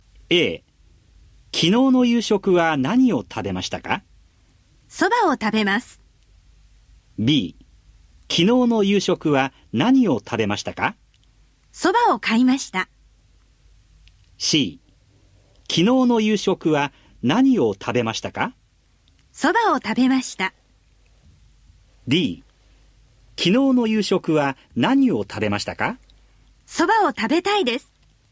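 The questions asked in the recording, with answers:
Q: 昨日の夕食は何を食べましたか?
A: C: そばを食べました。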